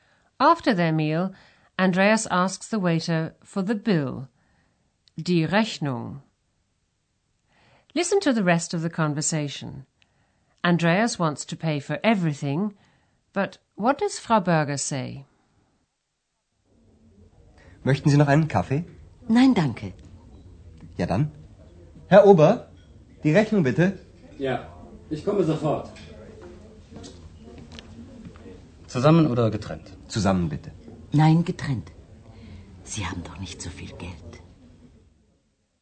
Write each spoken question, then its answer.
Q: Andreas wants to pay for everything, but what does Frau Berger say?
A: But Frau Berger says she would rather have a separate bill.